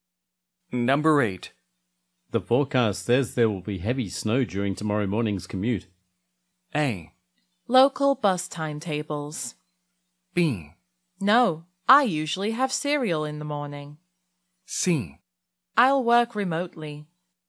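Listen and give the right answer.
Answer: C: I'll work remotely.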